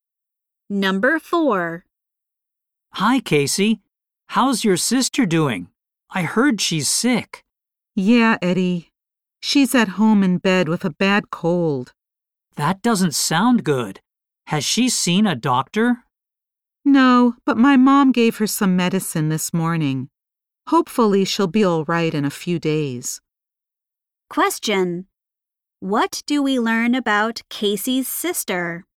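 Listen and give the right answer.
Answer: She is at home in bed with a bad cold.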